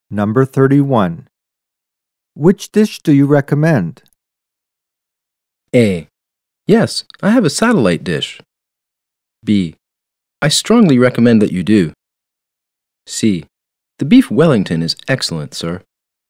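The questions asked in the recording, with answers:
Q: Which dish do you recommend?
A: C: The beef Wellington is excellent, sir.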